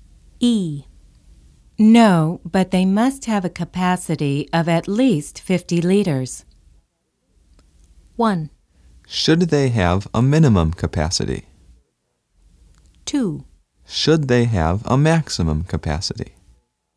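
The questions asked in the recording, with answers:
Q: No, but they must have a capacity of at least 50 liters.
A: 2: Should they have a maximum capacity?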